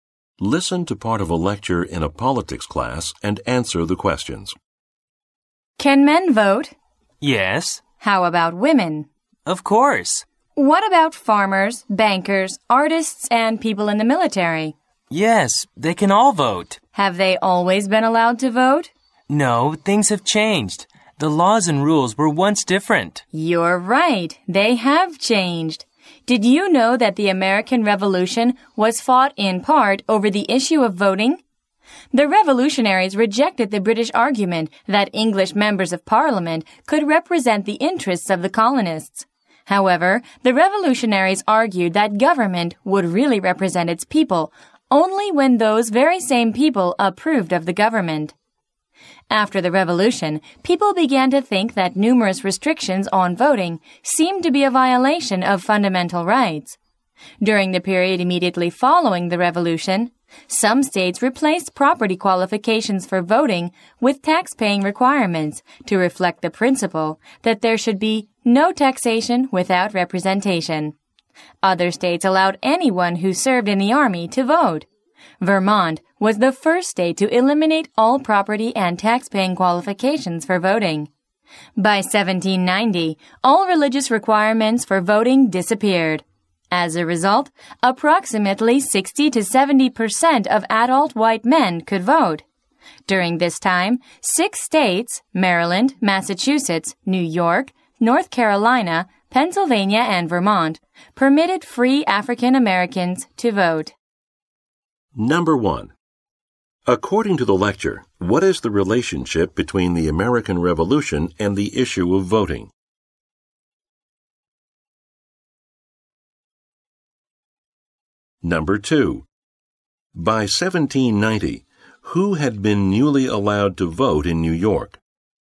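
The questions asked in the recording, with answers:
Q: According to the lecture, what is the relationship between the American Revolution and the issue of voting?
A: The Revolution was fought partly over voting rights (representation)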